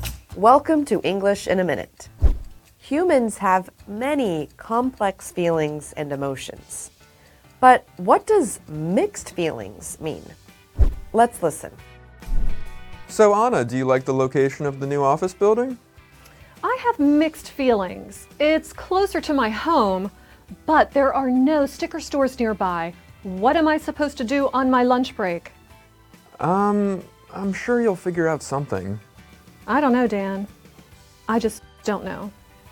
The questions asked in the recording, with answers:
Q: But what does mixed feelings mean?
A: If you have mixed feelings, you have conflicting emotions about something or someone.